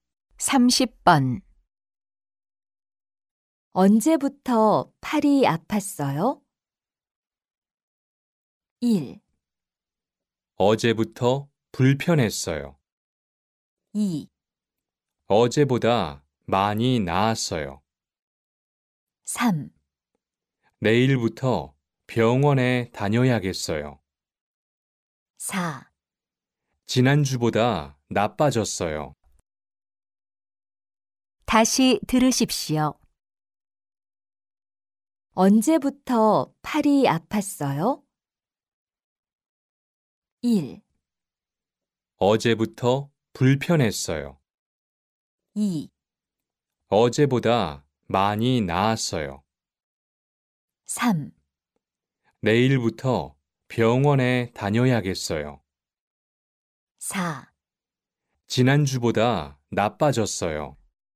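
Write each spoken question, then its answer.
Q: 언제부터 팔이 아팠어요?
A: 1: 어제부터 불편했어요.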